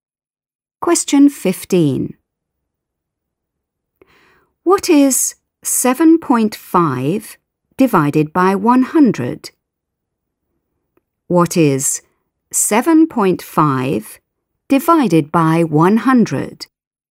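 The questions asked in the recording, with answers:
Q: What is 7.5 divided by 100?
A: 0.075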